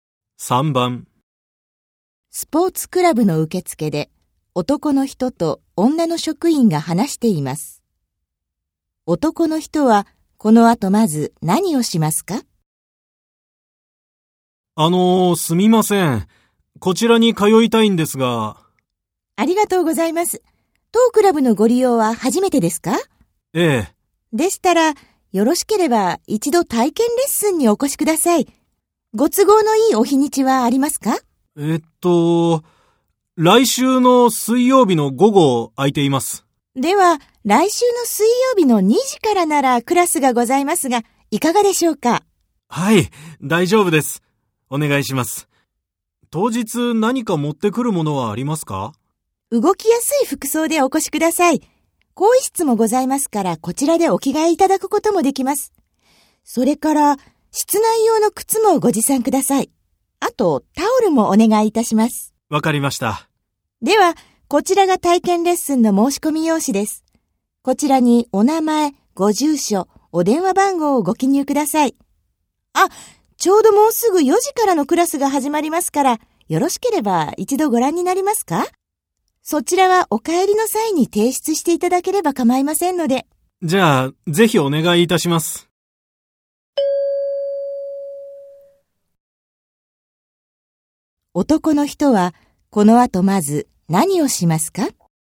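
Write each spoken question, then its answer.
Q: 男の人はこの後まず何をしますか?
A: 4時からのクラスを見学する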